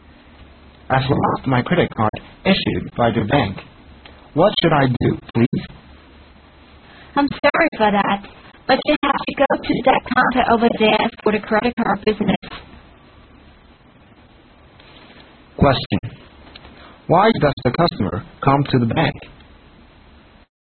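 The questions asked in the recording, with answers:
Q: Why does the customer come to the bank?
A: He lost his credit card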